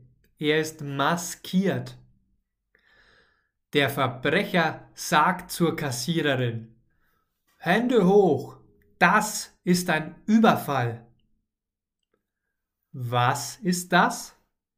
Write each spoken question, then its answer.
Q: Was ist das?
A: Ein Überfall. Das ist ein Überfall.